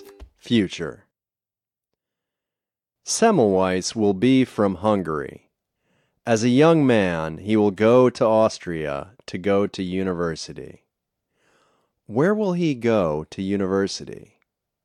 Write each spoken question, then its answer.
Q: Where will he go to university?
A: He will go to university in Austria.